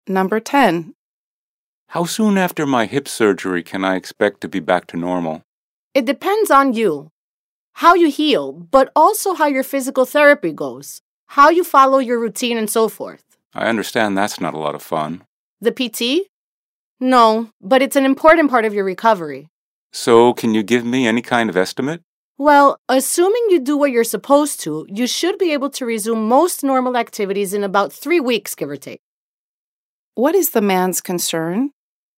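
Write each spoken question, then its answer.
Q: What is the man's concern?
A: How long it will take him to recover from his hip surgery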